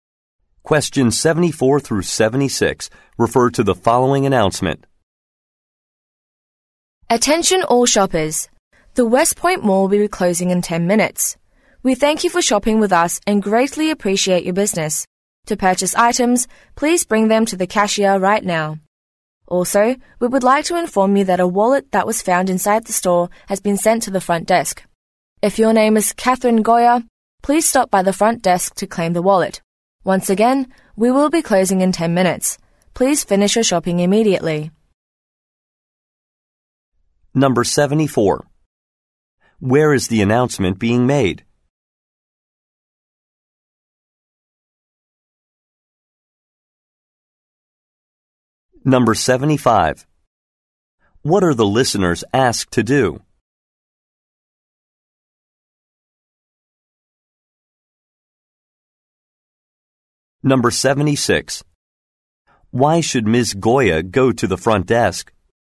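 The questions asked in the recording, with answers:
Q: Where is the announcement being made?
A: At a shopping mall

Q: What are the listeners asked to do?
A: Bring items to the cashier and finish shopping

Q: Why should Ms.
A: To claim her wallet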